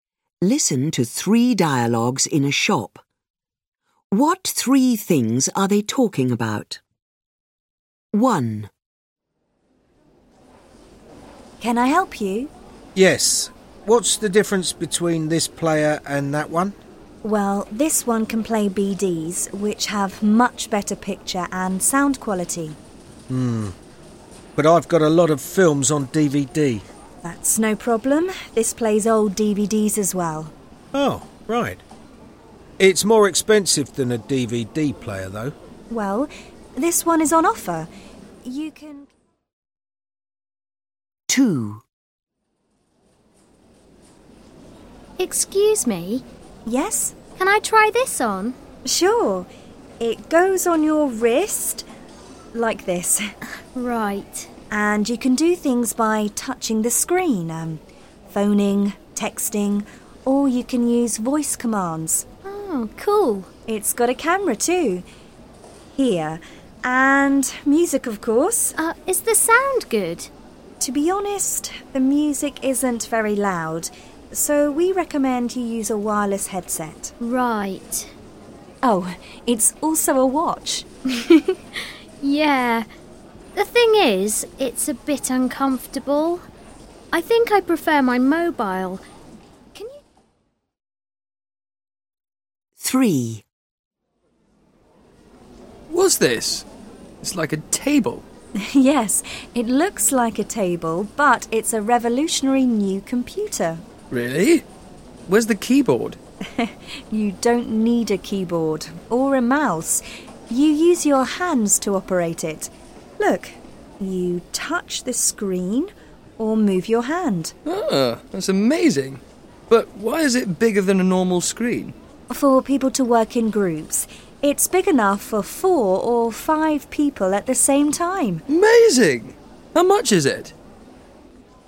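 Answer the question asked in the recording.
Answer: A Blu-ray (BD) player, a smartwatch (wrist phone), and a table-shaped touch-screen computer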